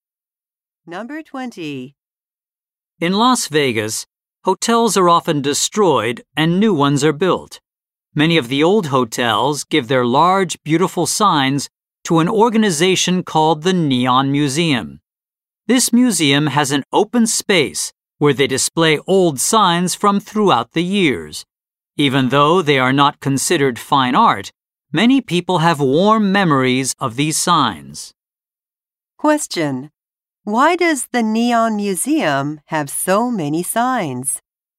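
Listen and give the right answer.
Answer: Old hotels that are destroyed give their signs to it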